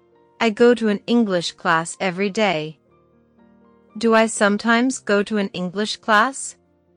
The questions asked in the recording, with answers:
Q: Do I sometimes go to an English class?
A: No, I don't. I go to an English class every day.